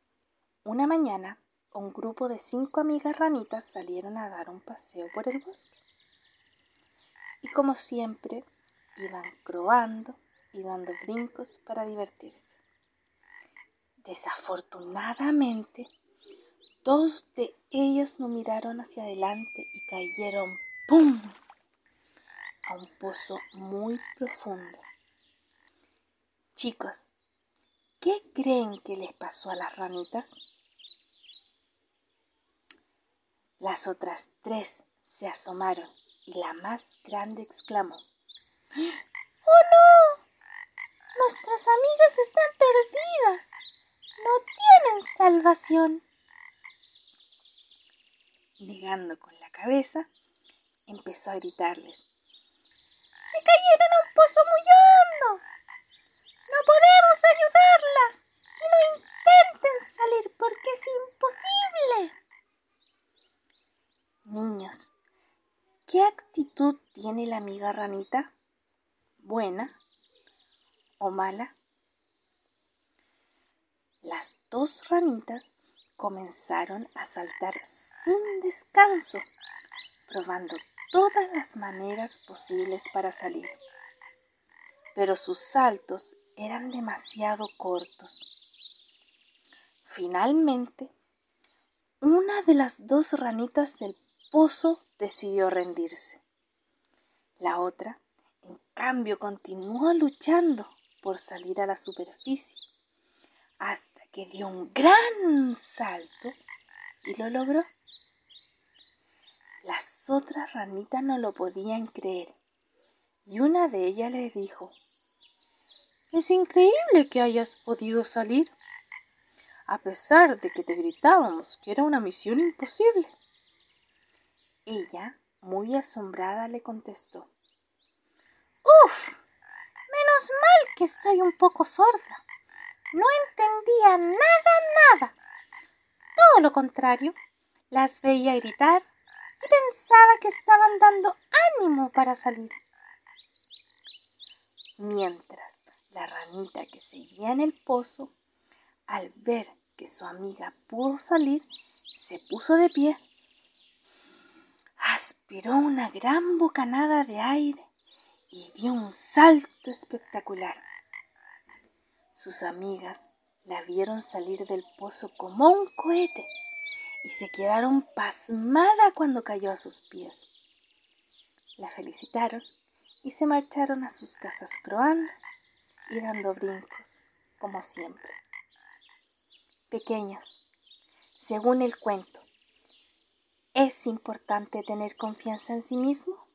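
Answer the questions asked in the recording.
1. Mala
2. Sí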